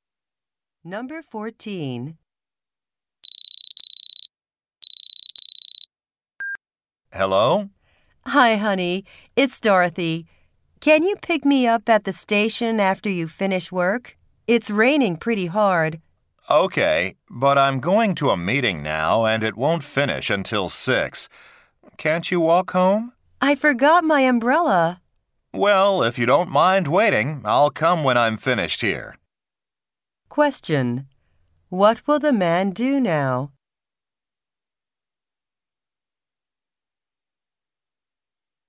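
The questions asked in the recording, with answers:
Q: What will the man do now?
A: Go to a meeting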